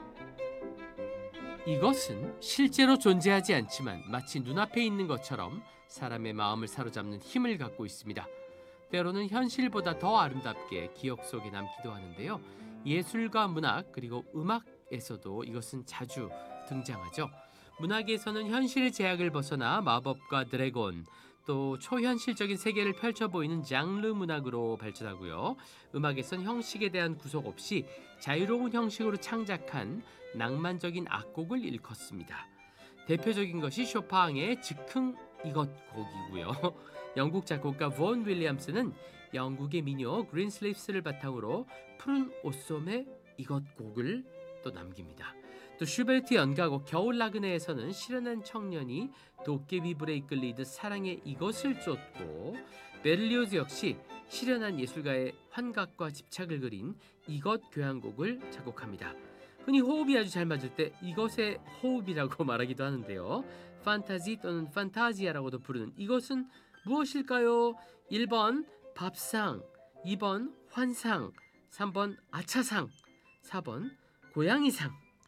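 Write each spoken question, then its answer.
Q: 판타지 또는 판타지아라고도 부르는 이것은 무엇일까요?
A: 2번: 환상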